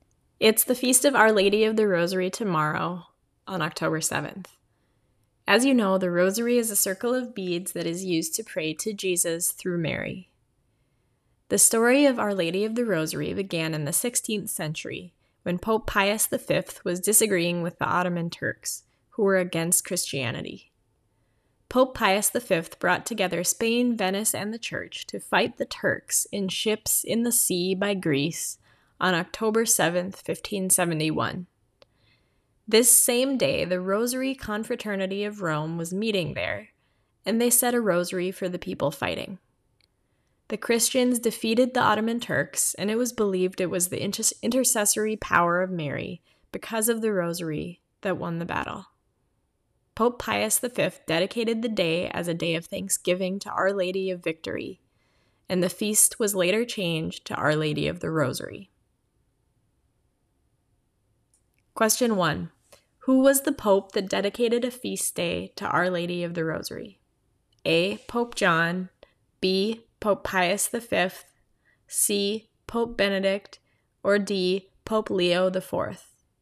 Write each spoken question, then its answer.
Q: Who was the Pope that dedicated a feast day to Our Lady of the Rosary?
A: The answer is B. Pope Pius V dedicated the feast day of Our Lady of the Rosary on the day the battle was won